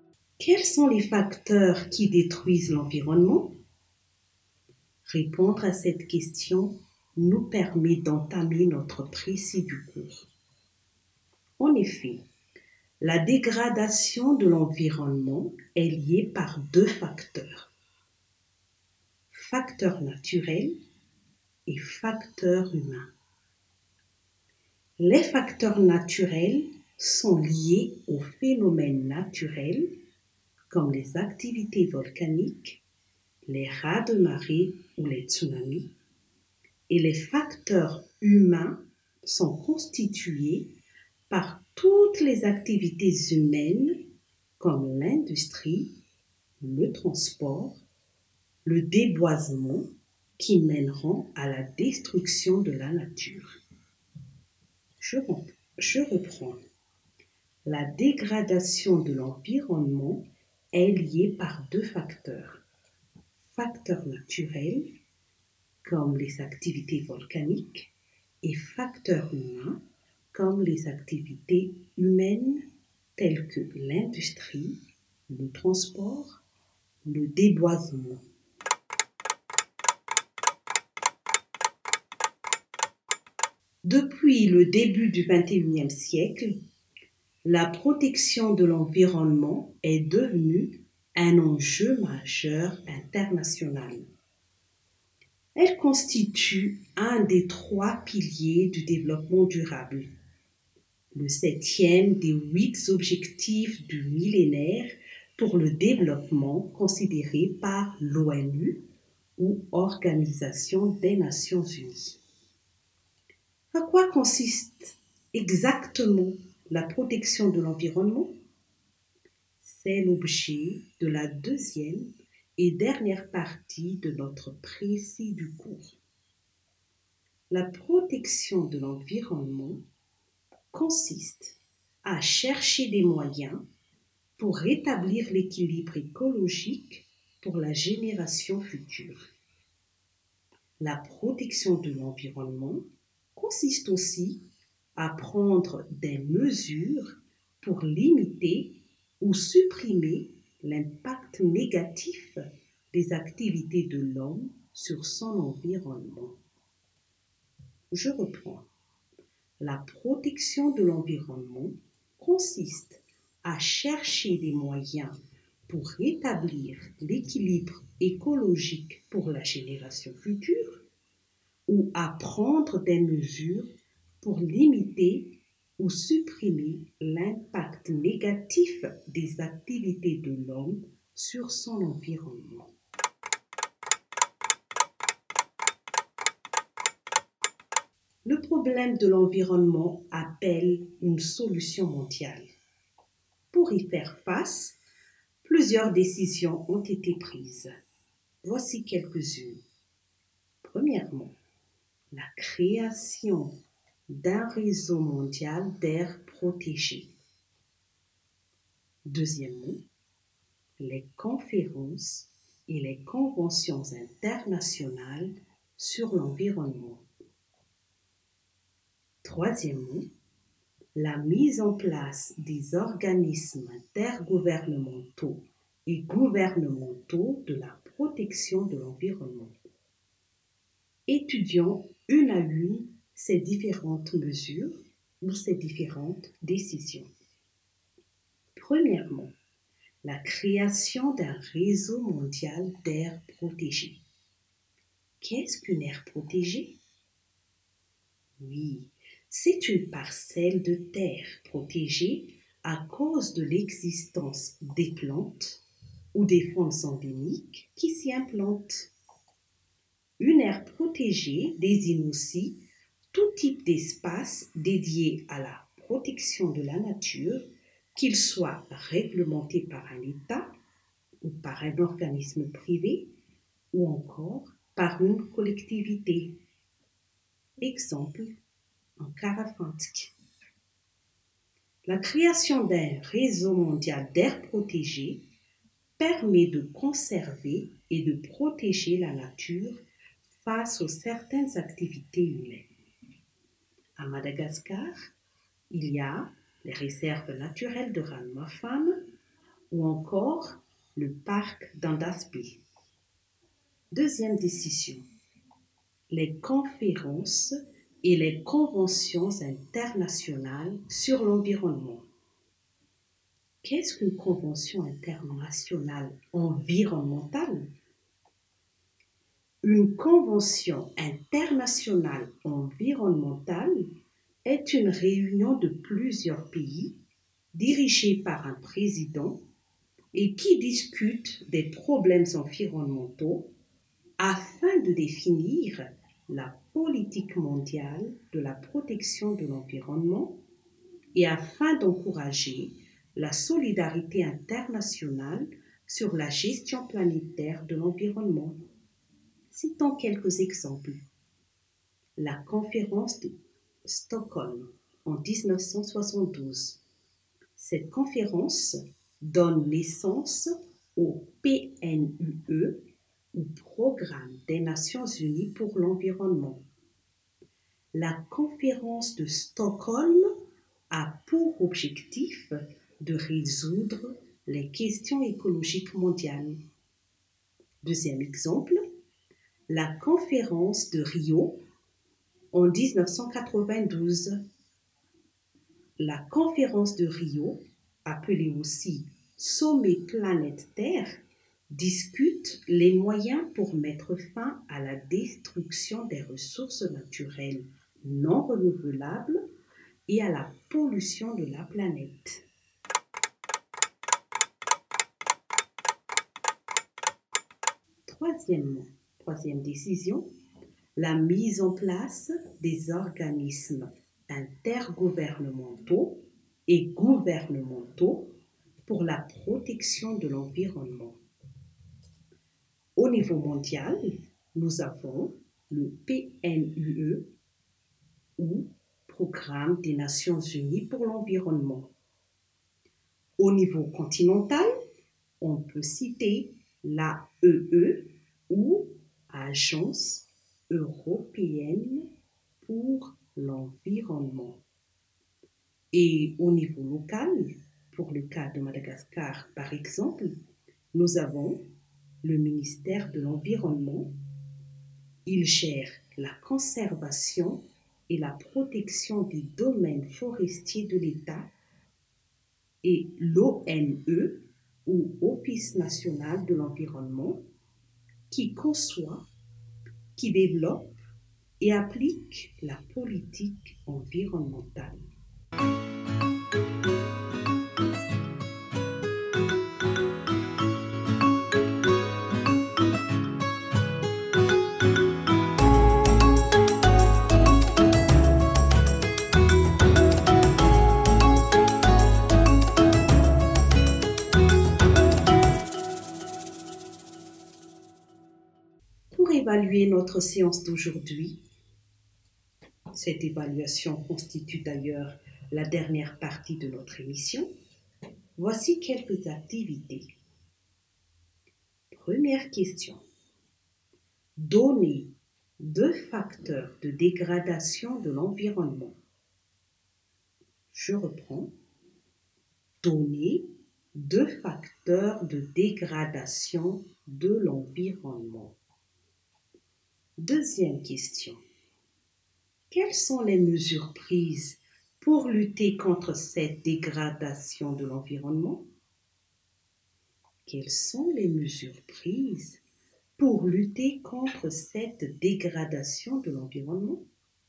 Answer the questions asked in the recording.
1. En effet, la dégradation de l'environnement est liée par deux facteurs. Facteur naturel et facteur humain.
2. Parmi les solutions mises en place pour protéger l'environnement, nous pouvons citer la création d'un réseau mondial d'air protégé ou encore les conférences et les conventions internationales sur l'environnement.